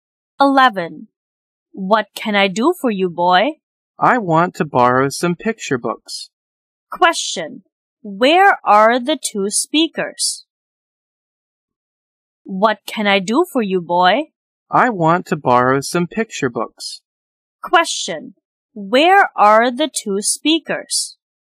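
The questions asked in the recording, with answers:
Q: Where are the 2 speakers?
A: In a library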